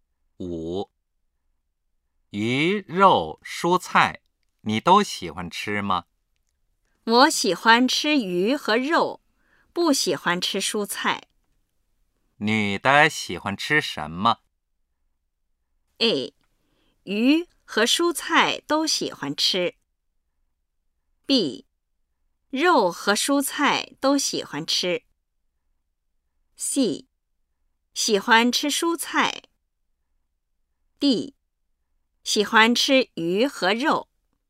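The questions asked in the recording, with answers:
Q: 女的喜欢吃什么?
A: D: 喜欢吃鱼和肉。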